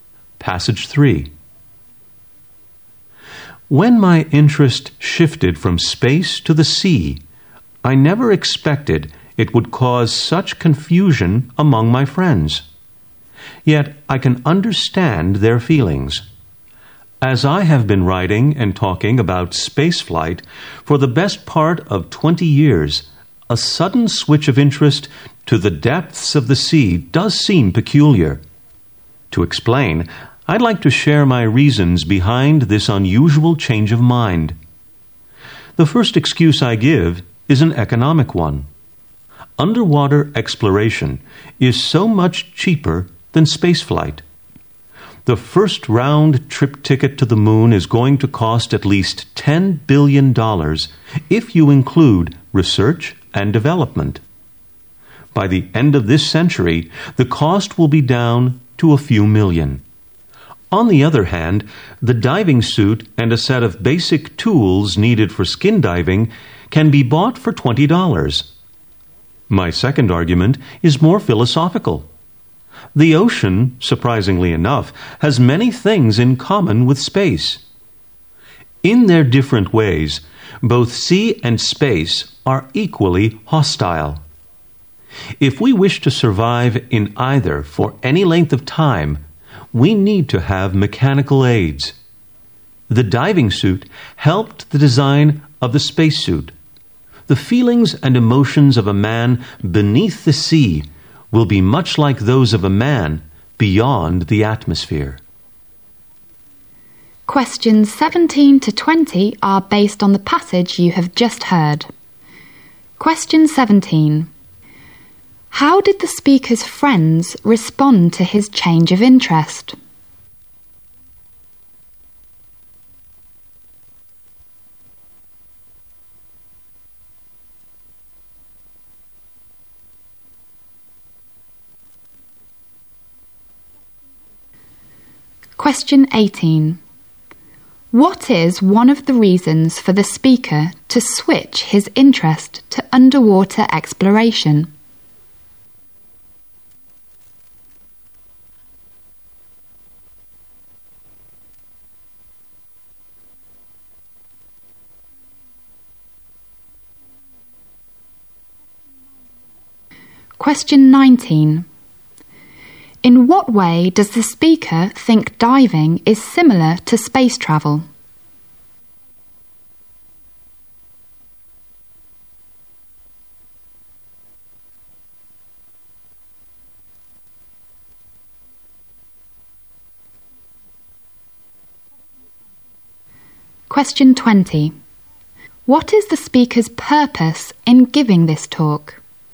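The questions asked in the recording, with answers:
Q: How did the speaker's friends respond to his change of interest?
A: They were confused

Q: What is one of the reasons for the speaker to switch his interest to underwater exploration?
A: Underwater exploration is much cheaper than spaceflight

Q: In what way does the speaker think diving is similar to space travel?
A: Both environments are hostile and require mechanical aids to survive

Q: What is the speaker's purpose in giving this talk?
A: To explain why he switched his interest from space to the sea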